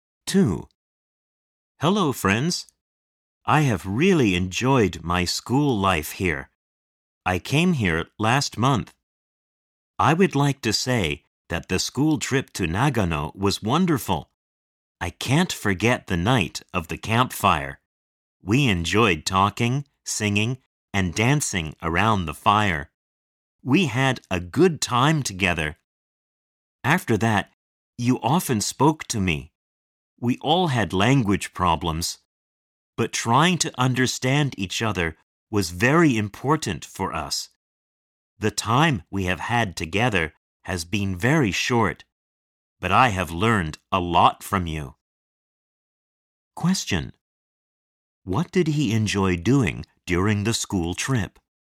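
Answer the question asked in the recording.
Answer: Talking, singing, and dancing around the campfire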